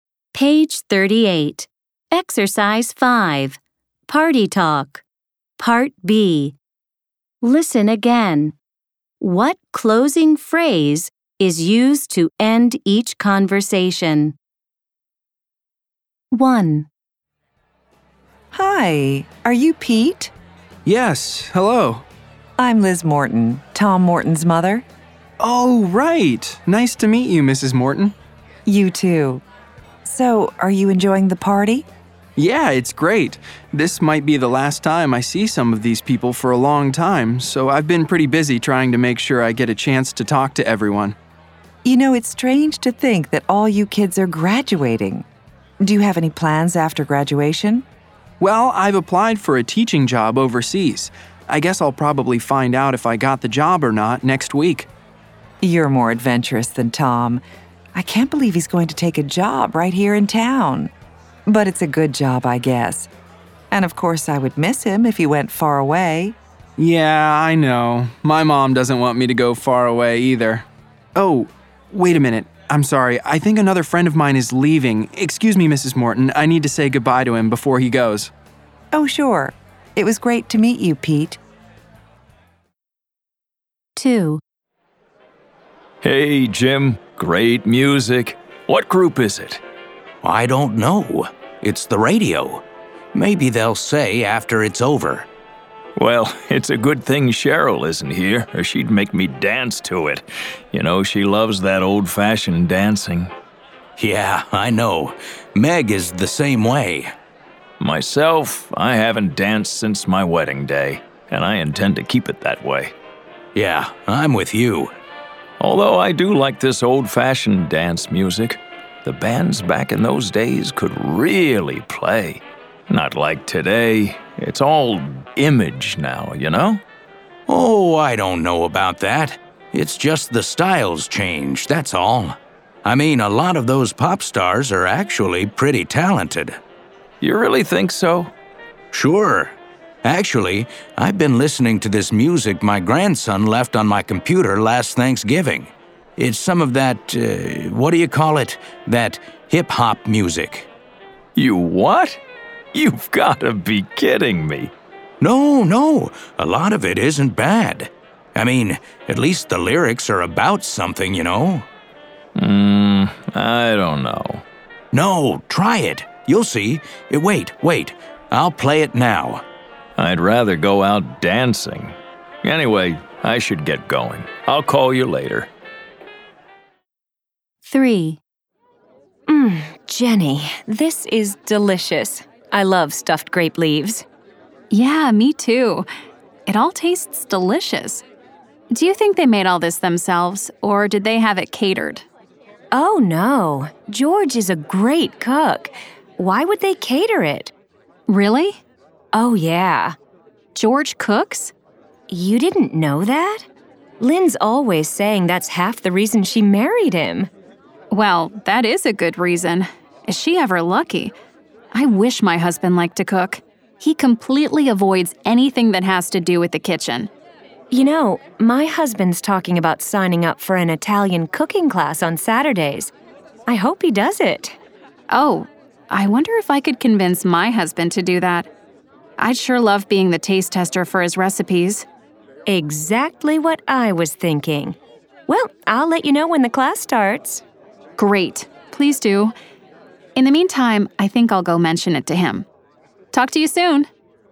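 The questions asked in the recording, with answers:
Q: What closing phrase is used to end each conversation?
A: Anyway, I should get going. I'll call you later.

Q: What closing phrase is used to end each conversation?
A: Talk to you soon.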